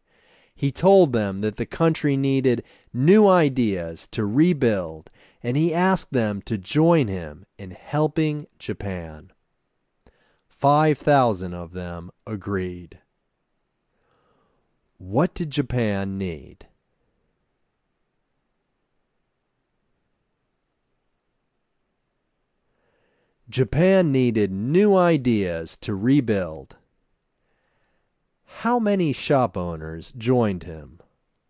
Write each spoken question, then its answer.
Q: How many shop owners joined him?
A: Five 5,000 bicycle shop owners joined him.